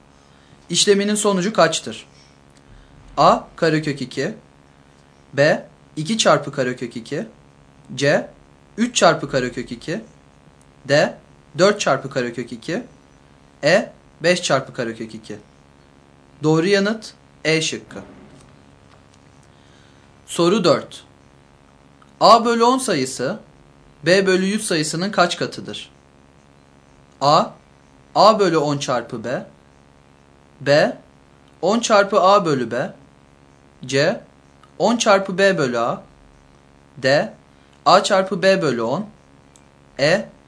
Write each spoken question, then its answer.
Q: A bölü 10 sayısı B bölü 100 sayısının kaç katıdır?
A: Doğru yanıt B şıkkı.